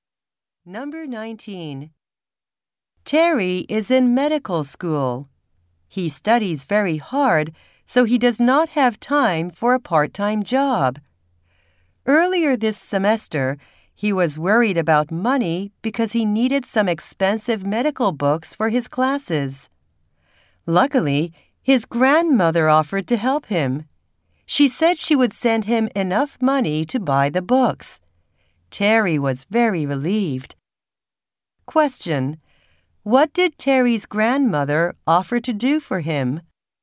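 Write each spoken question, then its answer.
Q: What did Terry's grandmother offer to do for him?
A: Send him money to buy his medical books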